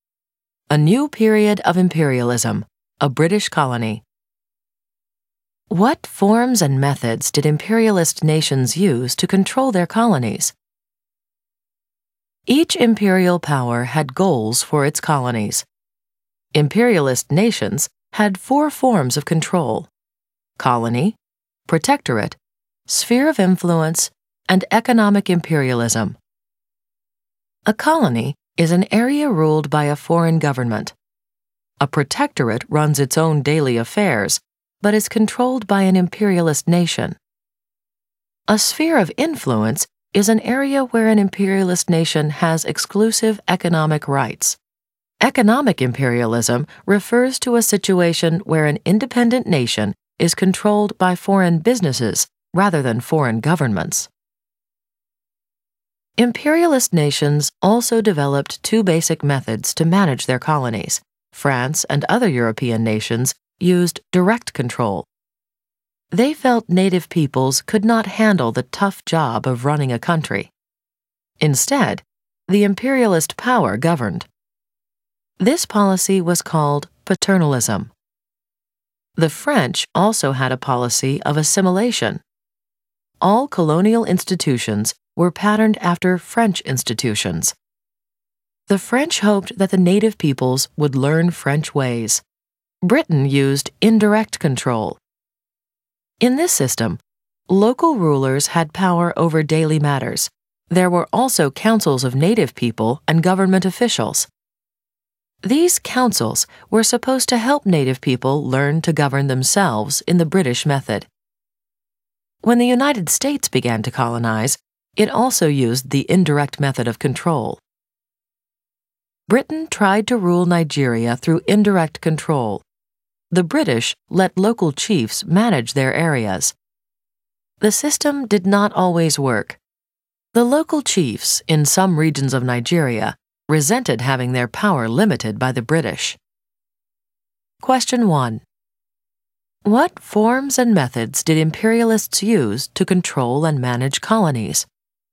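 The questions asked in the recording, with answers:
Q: What forms and methods did imperialists use to control and manage colonies?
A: Forms: colony, protectorate, sphere of influence, economic imperialism; methods: direct control (France) and indirect control (Britain, U.S.)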